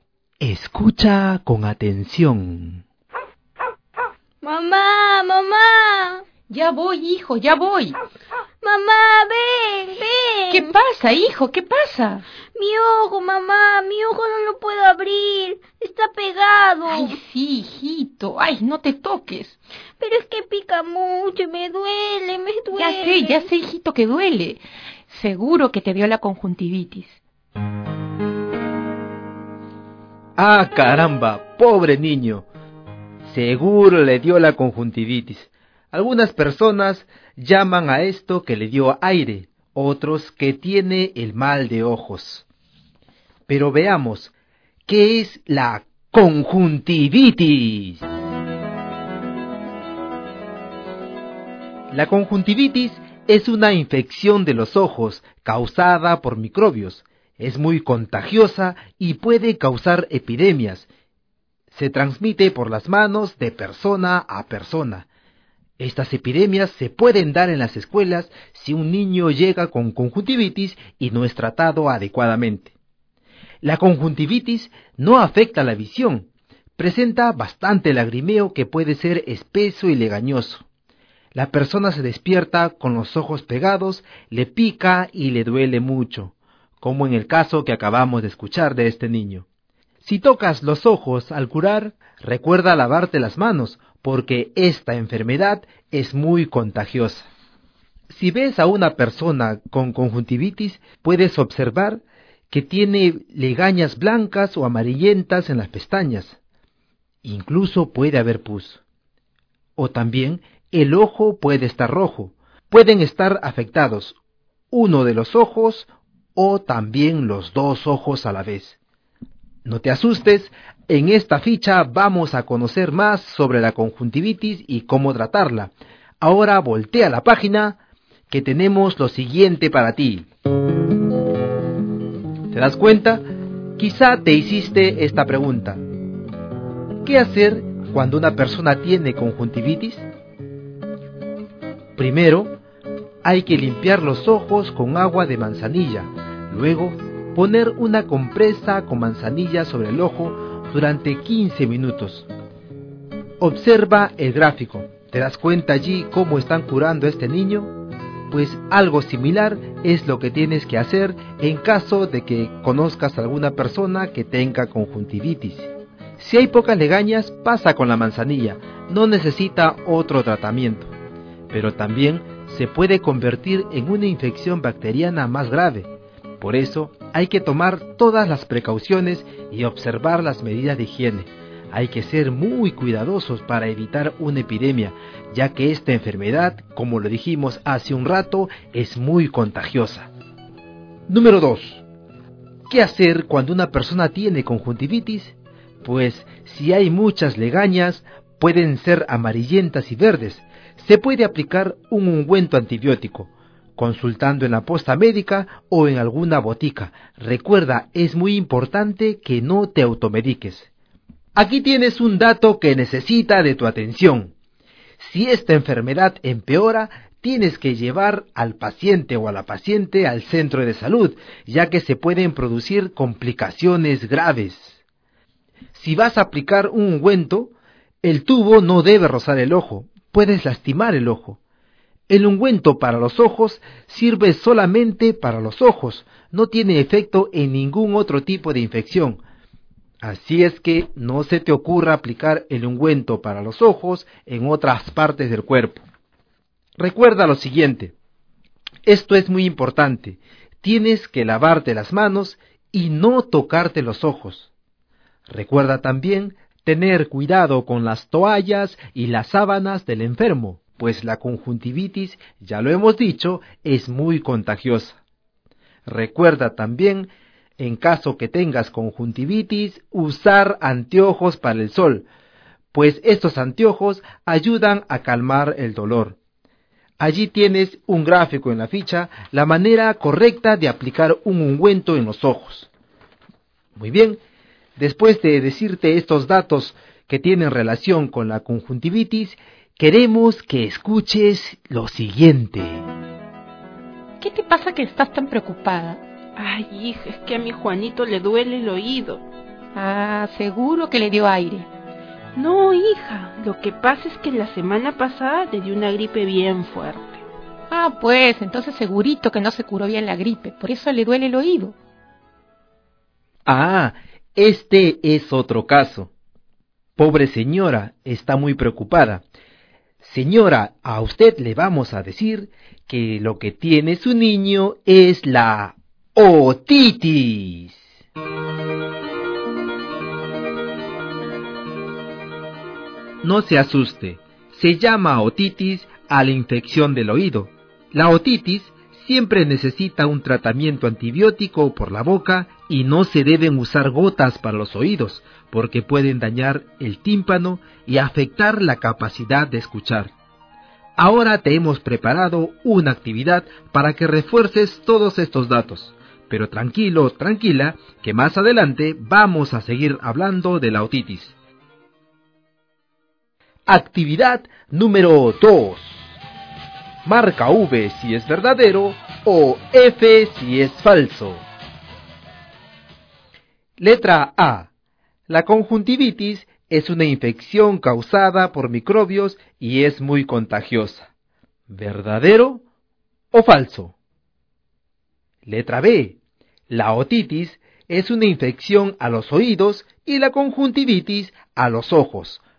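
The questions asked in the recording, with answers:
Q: La conjuntivitis es una infección causada por microbios y es muy contagiosa.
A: Verdadero

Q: La otitis es una infección a los oídos y la conjuntivitis a los ojos.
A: Verdadero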